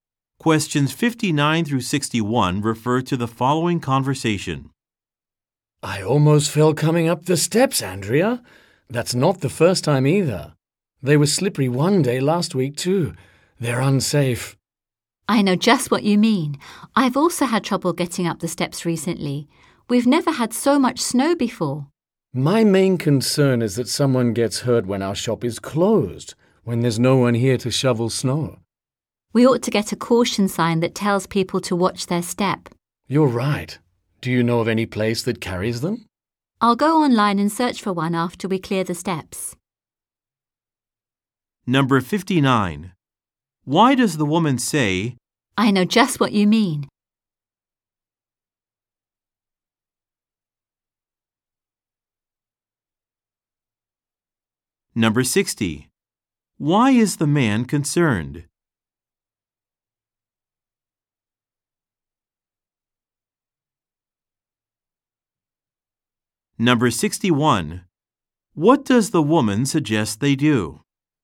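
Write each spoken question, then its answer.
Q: I know just what you mean?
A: She has also had trouble getting up the steps

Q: Why is the man concerned?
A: Someone may get hurt when the shop is closed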